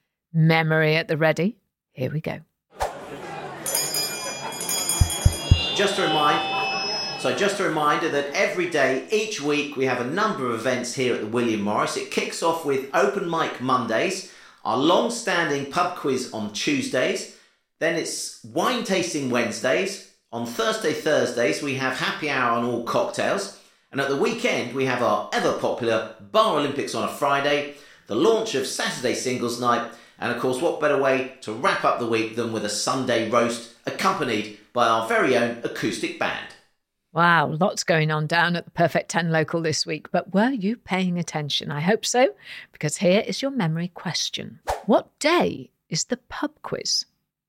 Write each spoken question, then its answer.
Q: What day is the pub quiz?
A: The answer was Tuesday.